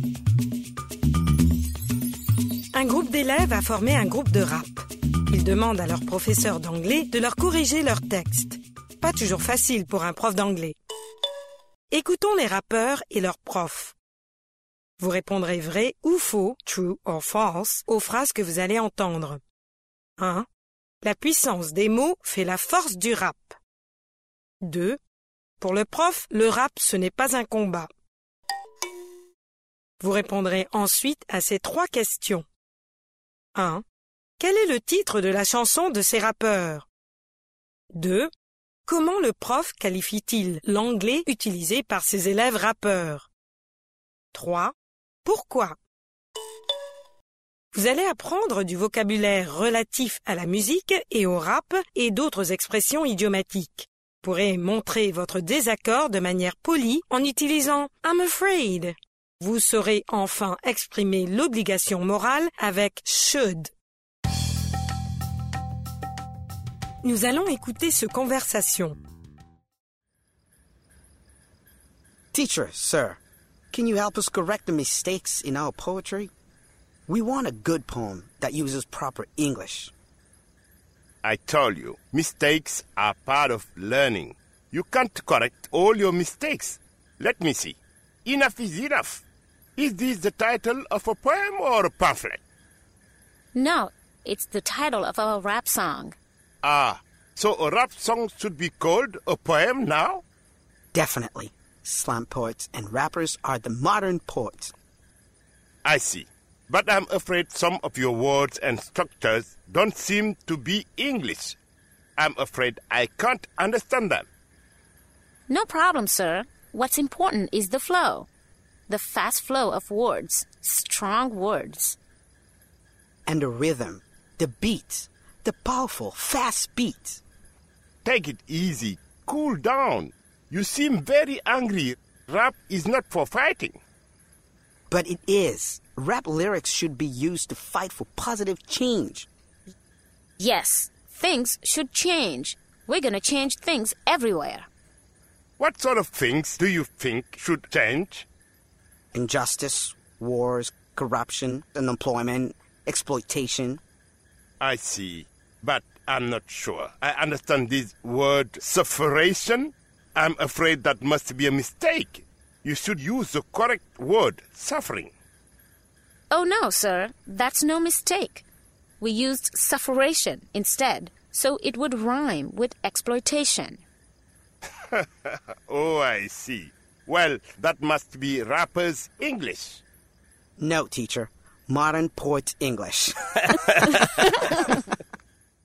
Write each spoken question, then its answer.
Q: La puissance des mots fait la force du rap.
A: L'énoncé 1 est vrai.

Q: Pour le prof, le rap, ce n'est pas un combat.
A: L'énoncé 2 est vrai.

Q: Quel est le titre de la chanson de ces rappeurs?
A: Enough is enough.

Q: Comment le prof qualifie-t-il l'anglais utilisé par ses élèves rappeurs?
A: D'anglais de rappeur.